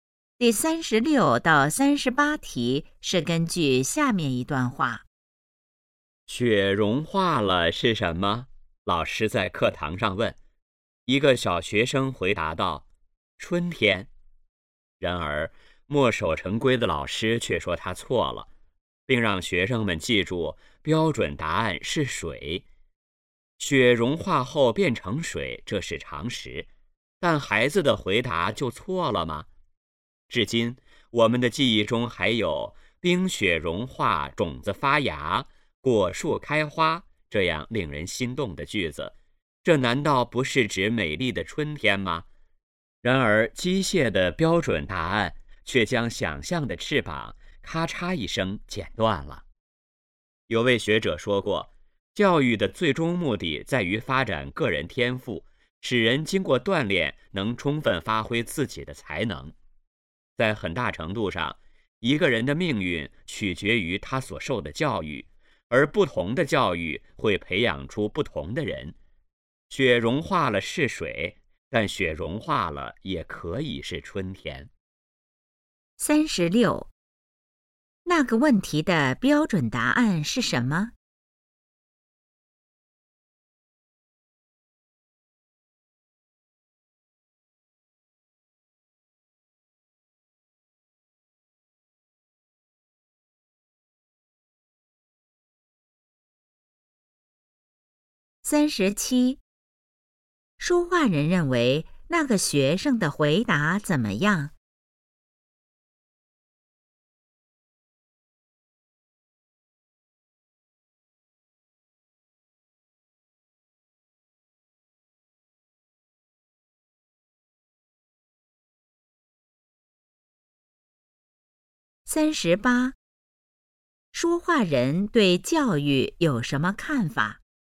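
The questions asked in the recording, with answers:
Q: 说话人认为那个学生的回答怎么样?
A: 没有错,很有想象力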